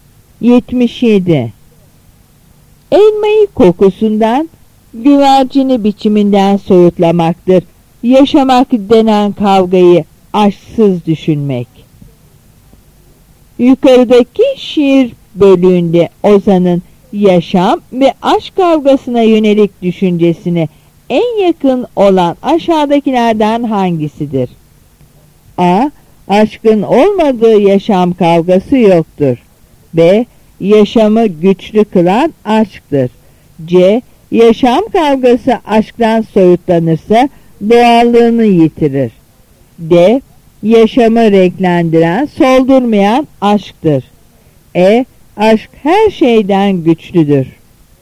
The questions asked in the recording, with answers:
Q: Yukarıdaki şiir bölüğünde Ozan'ın yaşam ve aşk kavgasına yönelik düşüncesine en yakın olan aşağıdakilerden hangisidir?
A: Yanıt C.